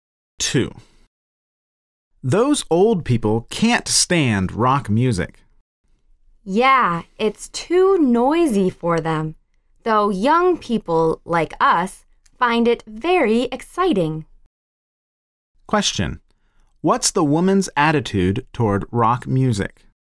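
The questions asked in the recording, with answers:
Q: What's the woman's attitude toward rock music?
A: She finds it very exciting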